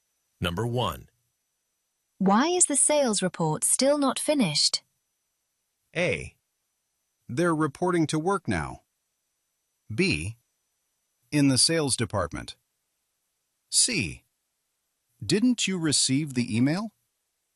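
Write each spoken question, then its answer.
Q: Why is the sales report still not finished?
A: C: Didn't you receive the email?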